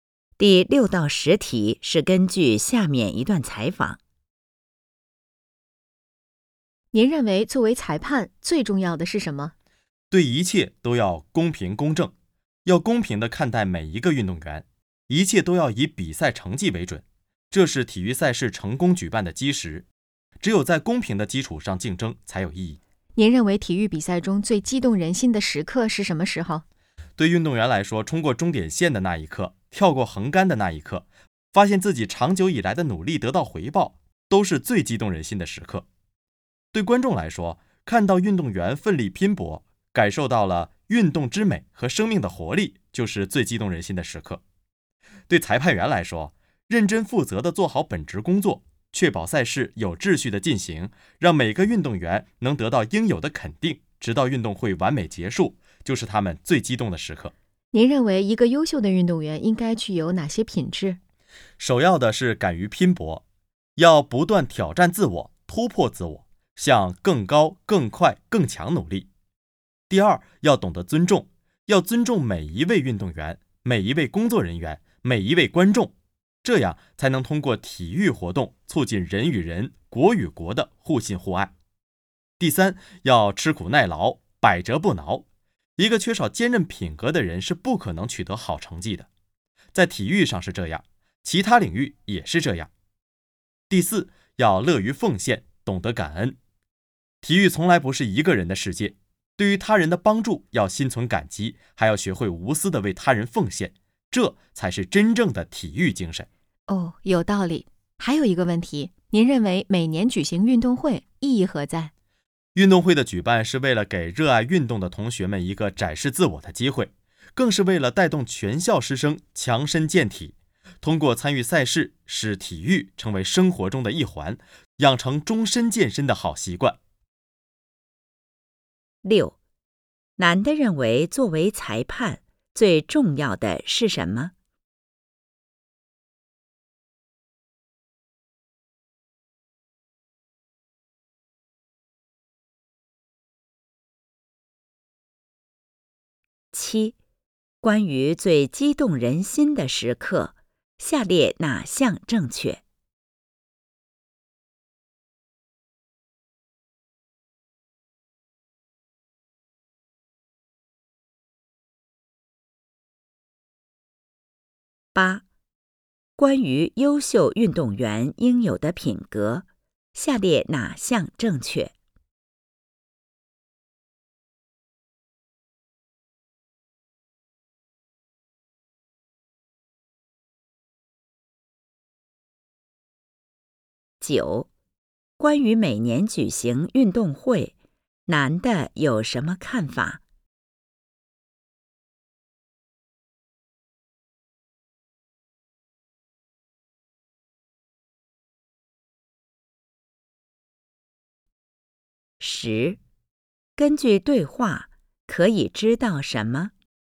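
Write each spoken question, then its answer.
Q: 男的认为作为裁判最重要的是什么?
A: 公平公正地对待每一个运动员

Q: 关于每年举行运动会,男的有什么看法?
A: 给学生展示自我的机会,带动师生强身健体,养成终身健身的习惯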